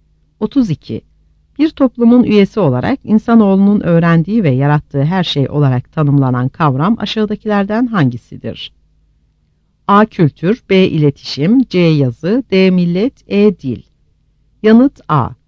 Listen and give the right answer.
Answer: Yanıt A.